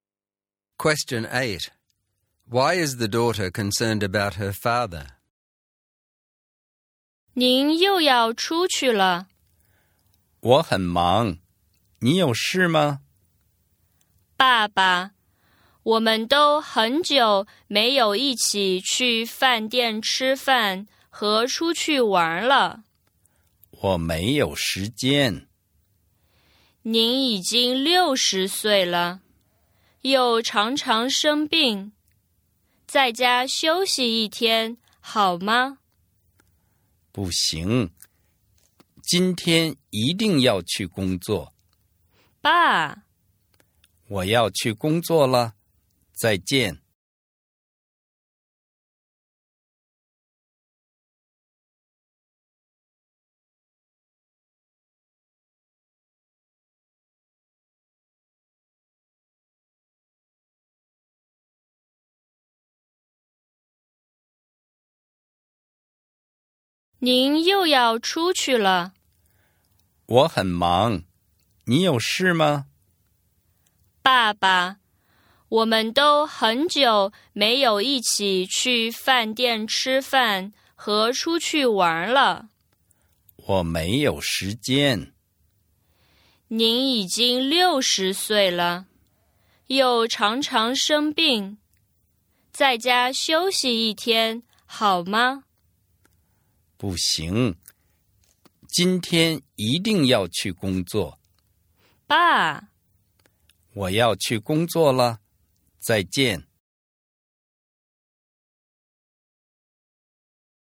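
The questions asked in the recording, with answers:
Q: Why is the daughter concerned about her father?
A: He is 60, often sick and always busy working; they haven't eaten out or gone out together for a long time, so she wants him to rest at home for a day.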